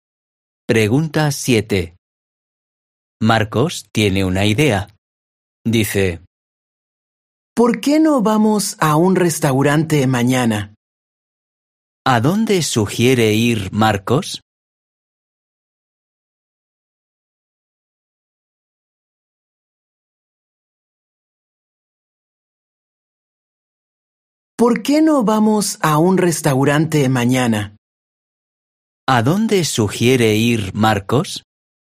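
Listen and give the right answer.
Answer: a un restaurante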